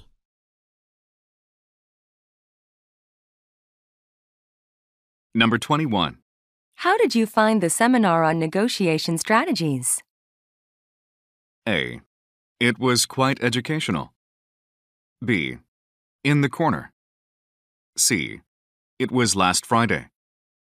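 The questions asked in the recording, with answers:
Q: How did you find the seminar on negotiation strategies?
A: A: It was quite educational.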